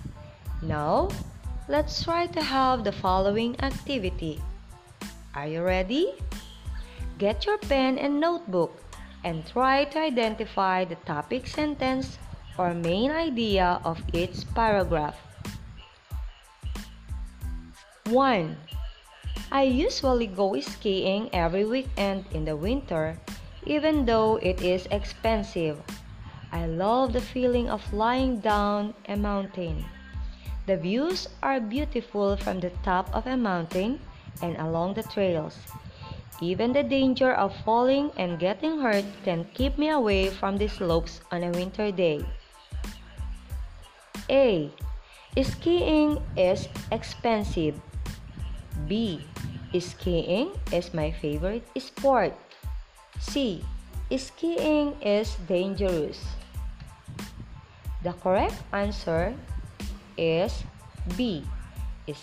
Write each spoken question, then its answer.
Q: Get your pen and notebook and try to identify the topic sentence or main idea of each paragraph.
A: The correct answer is B. Skiing is my favorite sport.